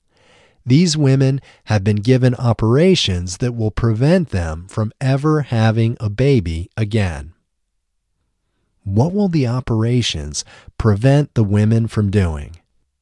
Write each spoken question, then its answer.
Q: What will the operations prevent the women from doing?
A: The operations will prevent the women from ever having a baby again.